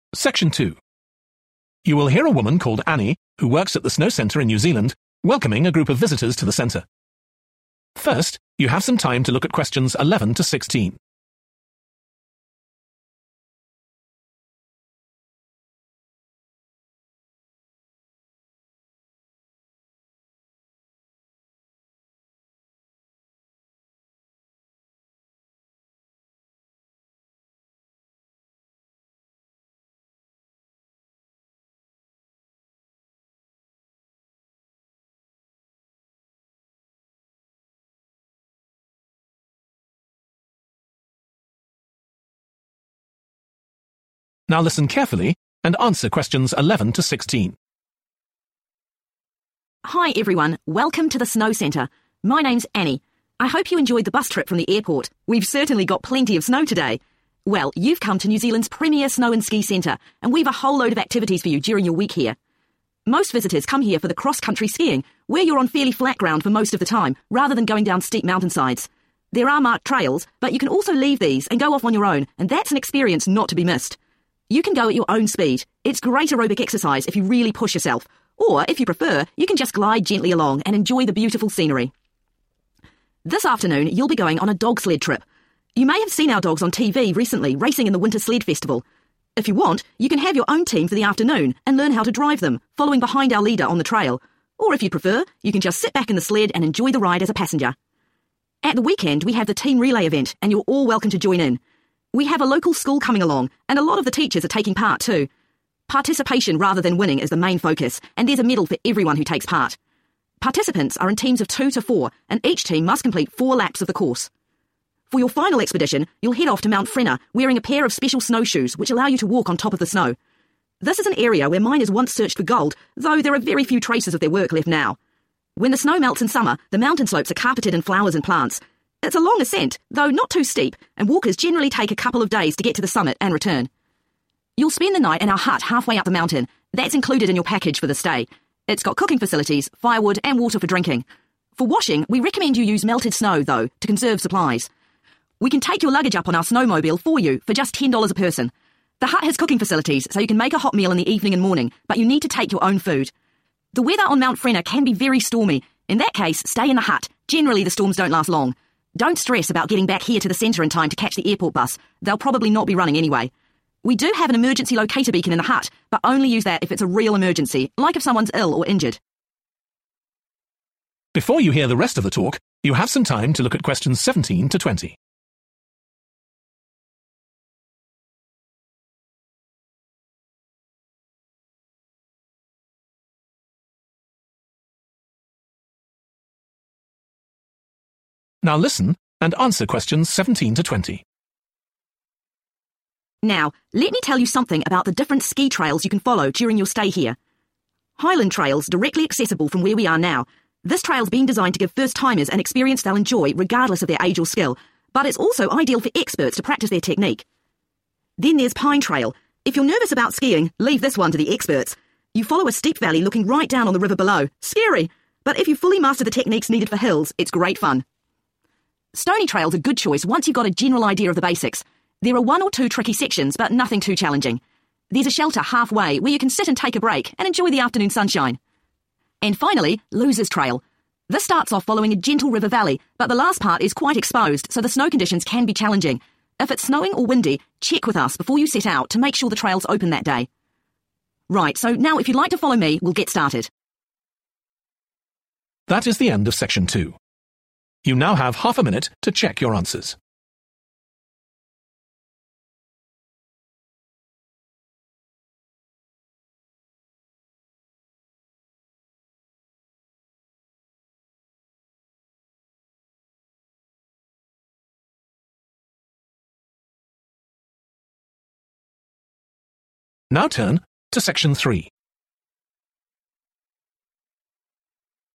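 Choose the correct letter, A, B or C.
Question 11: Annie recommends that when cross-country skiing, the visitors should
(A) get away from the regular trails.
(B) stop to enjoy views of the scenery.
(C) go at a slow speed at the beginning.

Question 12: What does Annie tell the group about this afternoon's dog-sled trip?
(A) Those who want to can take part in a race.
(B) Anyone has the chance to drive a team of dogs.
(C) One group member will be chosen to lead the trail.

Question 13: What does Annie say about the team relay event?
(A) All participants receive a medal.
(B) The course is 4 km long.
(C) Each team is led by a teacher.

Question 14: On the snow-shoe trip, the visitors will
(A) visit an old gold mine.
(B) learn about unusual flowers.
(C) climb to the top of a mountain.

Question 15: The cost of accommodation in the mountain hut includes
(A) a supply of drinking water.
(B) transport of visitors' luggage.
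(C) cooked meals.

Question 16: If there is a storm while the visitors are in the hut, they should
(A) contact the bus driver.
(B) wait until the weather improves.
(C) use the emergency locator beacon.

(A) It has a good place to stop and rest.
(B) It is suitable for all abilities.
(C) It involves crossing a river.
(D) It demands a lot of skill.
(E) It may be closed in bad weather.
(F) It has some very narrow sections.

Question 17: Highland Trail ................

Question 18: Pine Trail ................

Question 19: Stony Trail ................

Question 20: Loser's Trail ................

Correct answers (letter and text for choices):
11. (A) get away from the regular trails.
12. (B) Anyone has the chance to drive a team of dogs.
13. (A) All participants receive a medal.
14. (C) climb to the top of a mountain.
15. (A) a supply of drinking water.
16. (B) wait until the weather improves.
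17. (B) It is suitable for all abilities.
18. (D) It demands a lot of skill.
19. (A) It has a good place to stop and rest.
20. (E) It may be closed in bad weather.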